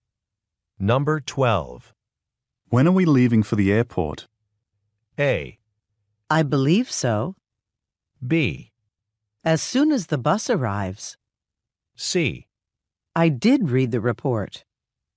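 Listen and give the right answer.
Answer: B: As soon as the bus arrives.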